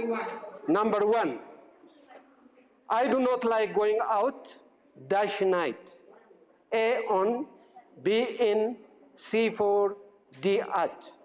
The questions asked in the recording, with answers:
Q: I do not like going out, dash night.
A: D at.